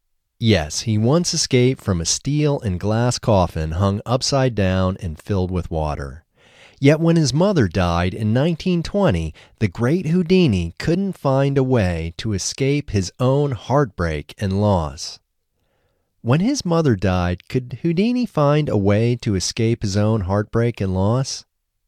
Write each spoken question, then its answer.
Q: When his mother died, could Houdini find a way to escape his own heartbreak and loss?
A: No, when his mother died, Houdini couldn't find a way to escape his own heartbreak and loss.